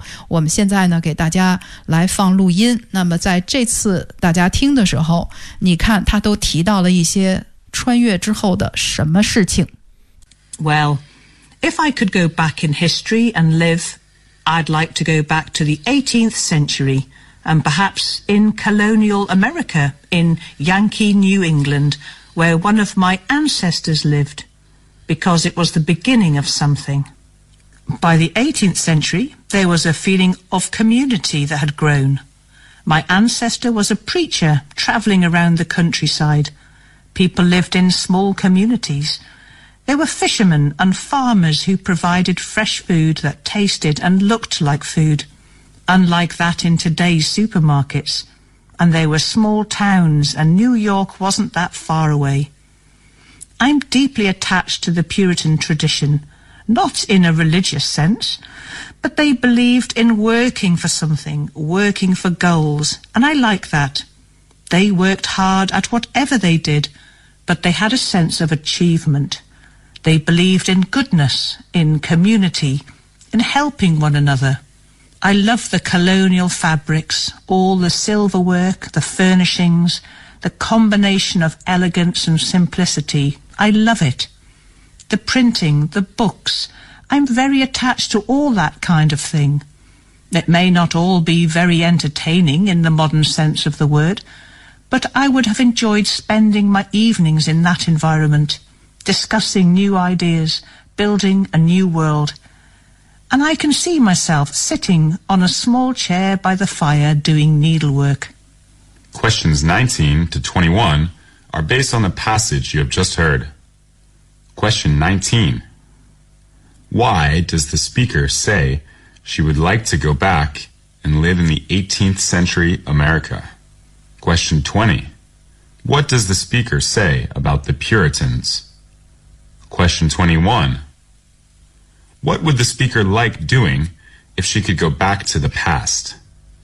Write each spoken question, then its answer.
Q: Why does the speaker say she would like to go back and live in the 18th century America?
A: Another reason would be that the speaker had an ancestor that lived in that period of time.

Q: What does the speaker say about the Puritans?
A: The speaker said there is a deep attachment between her and the tradition.

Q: What would the speaker like doing if she could go back to the past?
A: She would spend the evening in the environment, discussing new ideas, building a new world.